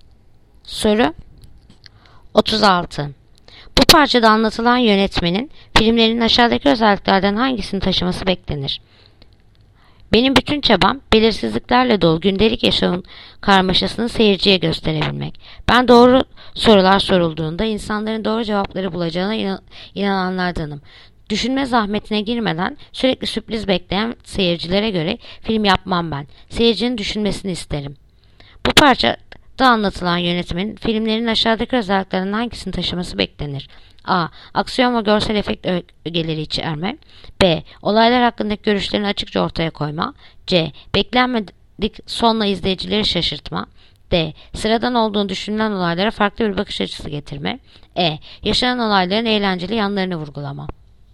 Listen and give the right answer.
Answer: Yanıt Diyarbakır. Sıradan olduğu düşünülen olaylara farklı bir bakış açısı getirme.